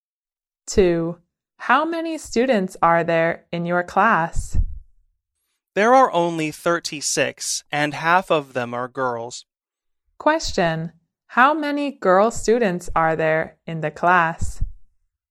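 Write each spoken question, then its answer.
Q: How many girl students are there in the class?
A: 18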